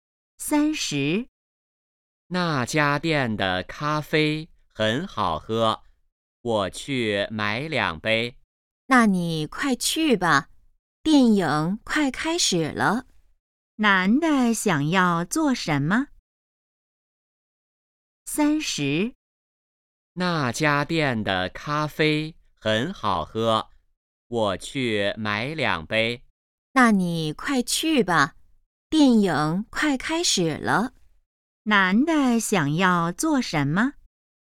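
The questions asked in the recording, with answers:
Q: 男的想要做什么?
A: 买咖啡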